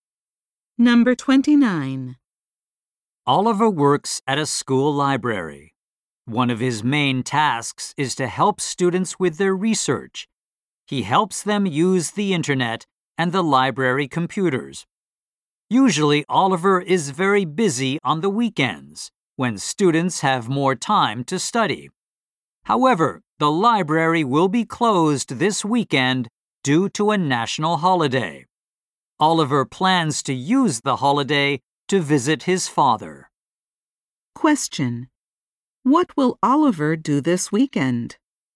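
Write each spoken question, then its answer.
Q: What will Oliver do this weekend?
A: Visit his father.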